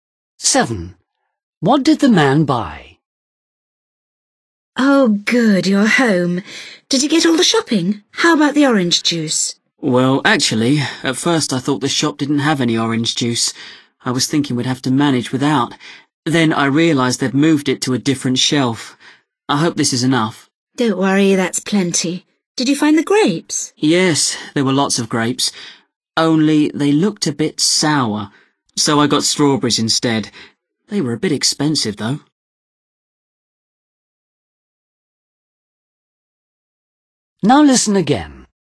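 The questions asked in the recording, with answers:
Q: What did the man buy?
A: orange juice and strawberries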